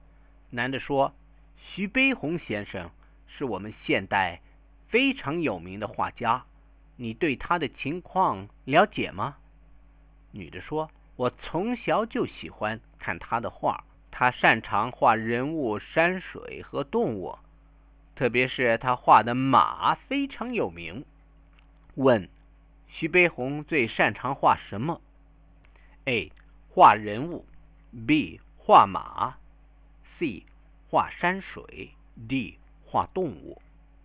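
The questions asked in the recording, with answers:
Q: 徐悲鸿最擅长画什么?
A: B: 画马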